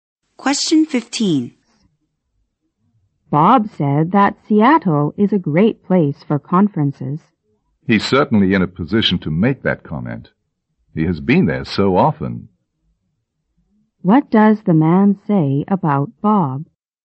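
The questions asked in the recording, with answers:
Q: What does the man say about Bob?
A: Bob has been to Seattle often, so he knows it well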